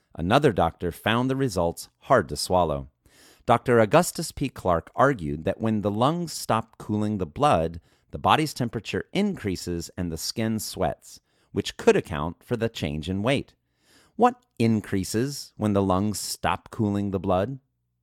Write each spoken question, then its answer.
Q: What increases when the lungs stop cooling the blood?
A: The body's temperature increases when the lungs stop cooling the blood.